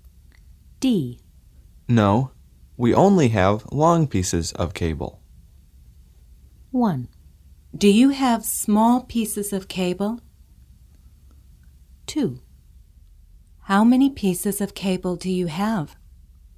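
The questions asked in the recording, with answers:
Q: No, we only have long pieces of cable.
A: 1: Do you have small pieces of cable?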